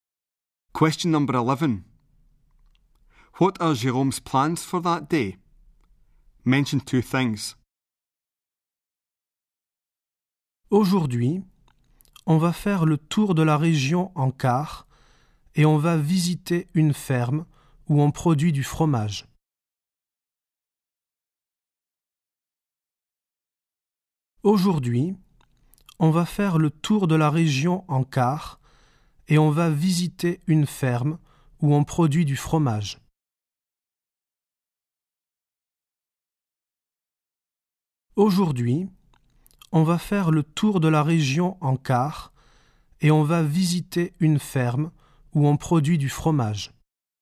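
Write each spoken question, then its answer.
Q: What are Jérôme's plans for that day?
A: Coach tour of the region and visiting a cheese-making farm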